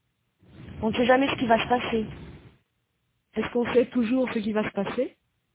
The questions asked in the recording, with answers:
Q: Est-ce qu'on sait toujours ce qui va se passer?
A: Non, on ne sait jamais ce qui va se passer.